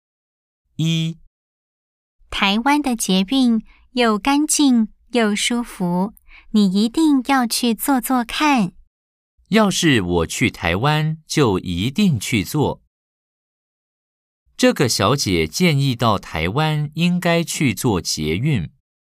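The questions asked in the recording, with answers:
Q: 这个小姐建议到台湾应该去坐捷运。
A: True (O)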